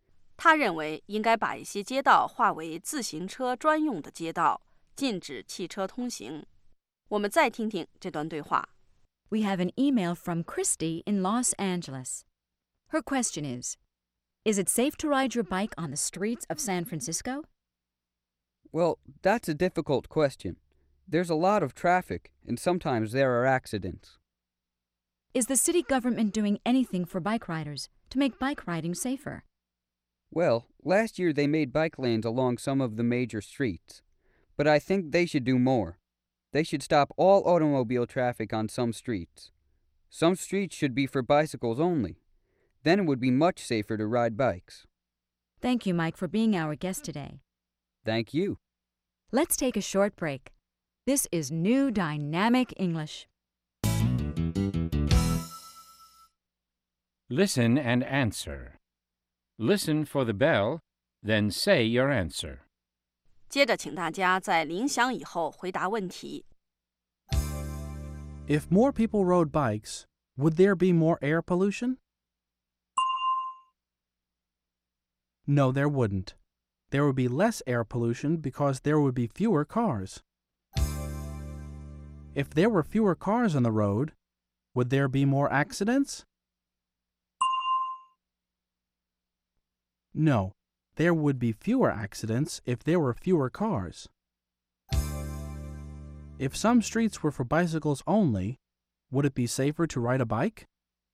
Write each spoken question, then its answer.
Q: If some streets were for bicycles only, would it be safer to ride a bike?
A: Yes, it would.It would be much safer.